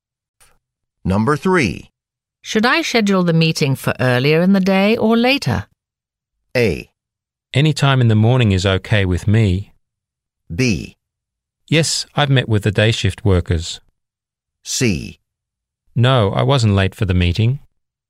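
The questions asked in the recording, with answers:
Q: Should I schedule the meeting for earlier in the day or later?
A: A: Any time in the morning is okay with me.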